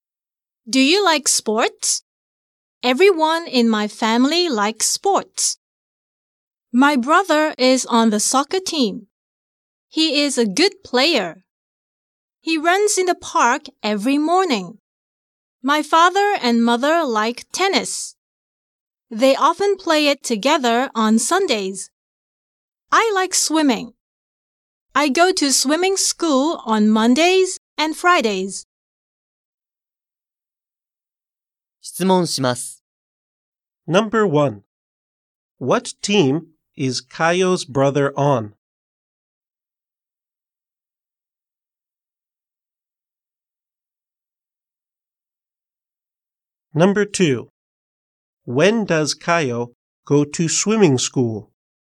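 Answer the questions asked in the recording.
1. He is on the soccer team.
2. She goes on Mondays and Fridays.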